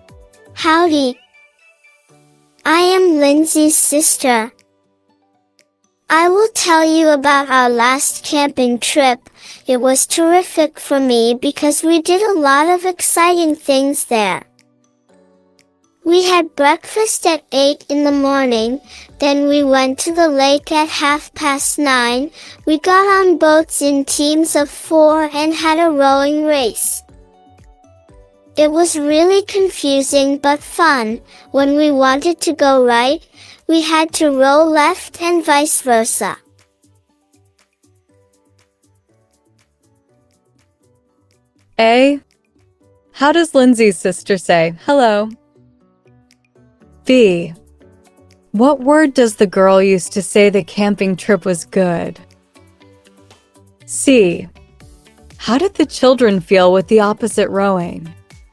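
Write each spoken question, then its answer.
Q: How does Lindsay's sister say hello?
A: Howdy

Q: What word does the girl use to say the camping trip was good?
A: terrific

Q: How did the children feel with the opposite rowing?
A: It was confusing but fun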